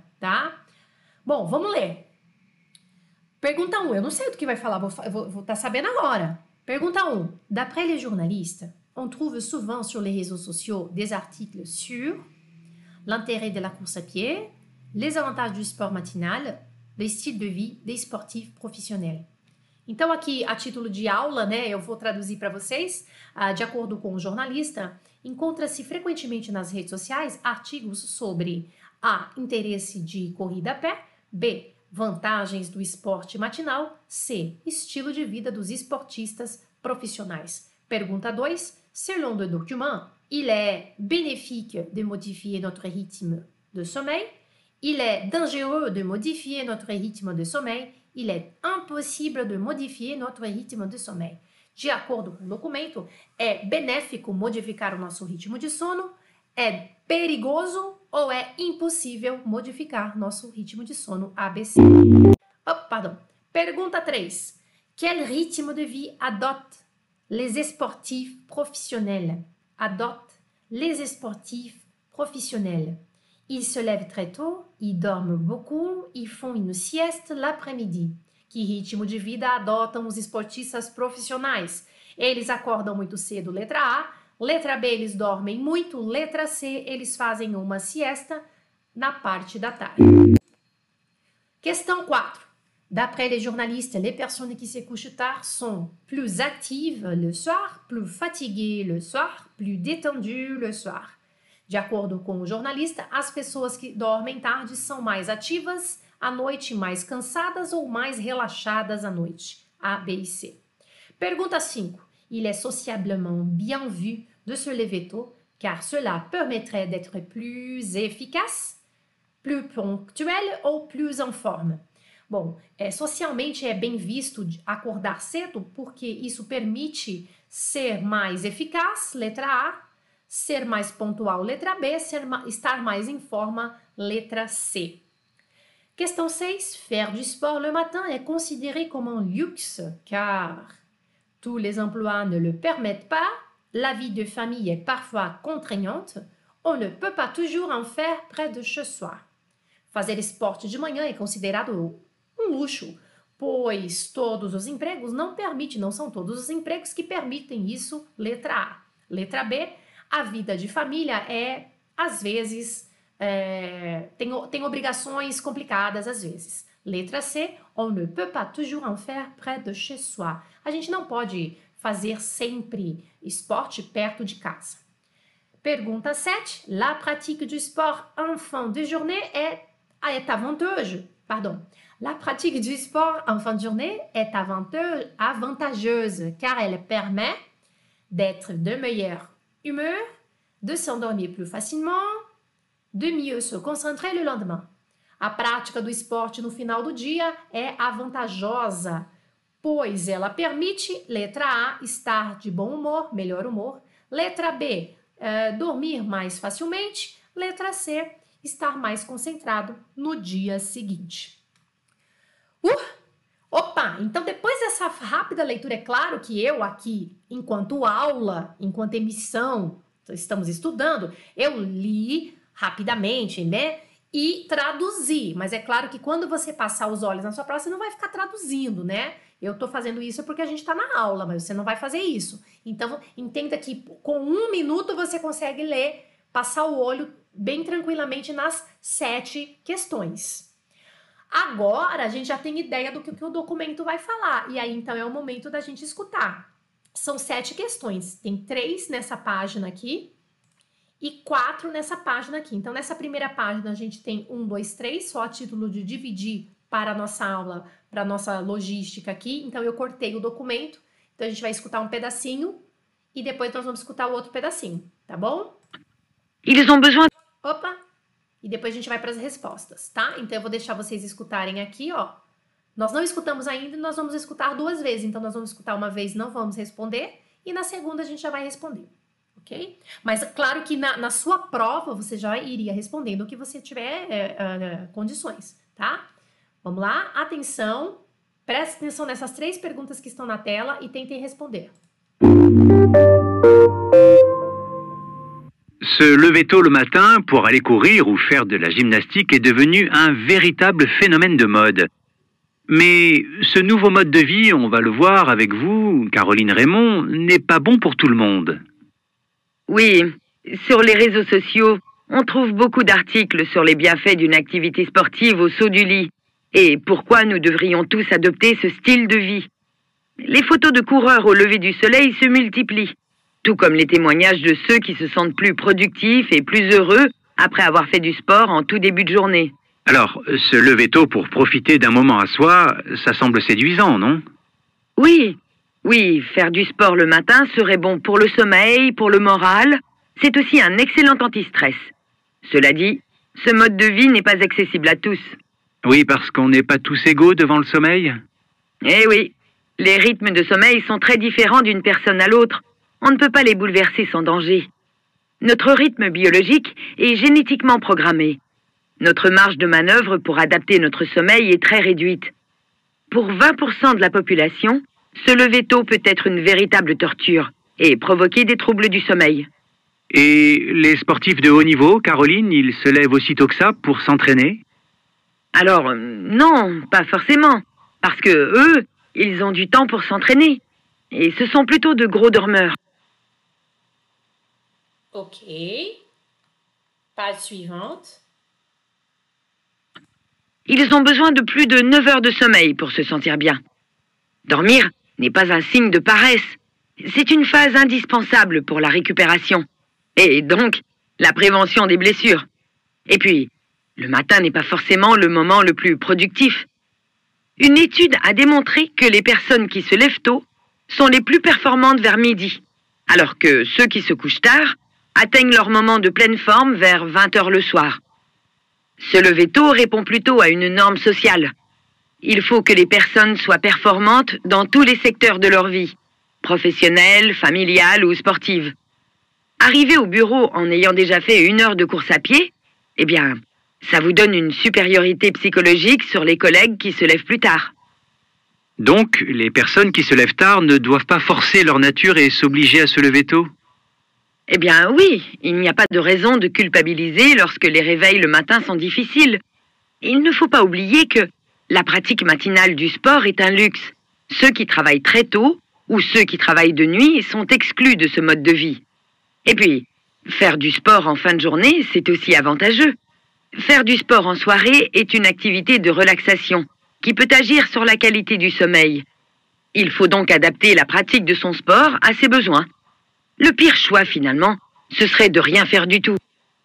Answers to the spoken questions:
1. d'après les journalistes, on trouve souvent les réseaux sociaux des articles sur les avantages du sport matinal.
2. Selon le document, il est dangereux de modifier notre rythme de sommeil.
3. Ils dorment beaucoup.
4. Letra A, pergunta 4.
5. é mais eficaz.
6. Pois tous les emplois ne le permettent pas.
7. de s'endormir plus facilement.